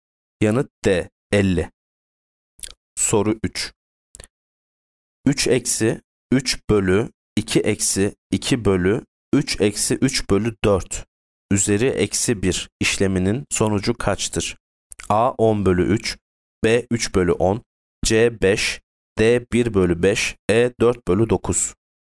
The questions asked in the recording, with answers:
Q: 3 eksi 3 bölü 2 eksi 2 bölü 3 eksi 3 bölü 4 üzeri eksi 1 işleminin sonucu kaçtır?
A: Yanıt A 10 bölü 3.